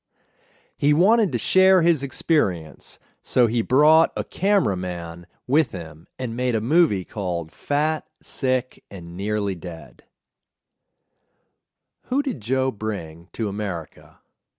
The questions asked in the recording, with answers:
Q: Who did Joe bring to America?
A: Joe brought a cameraman to America.